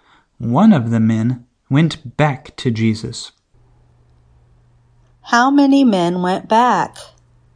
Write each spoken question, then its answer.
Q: How many men went back?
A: One man went back.